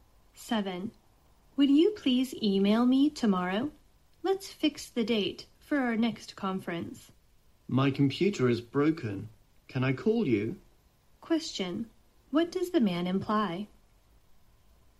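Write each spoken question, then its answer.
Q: What does the man imply?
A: He can't send an email and would rather phone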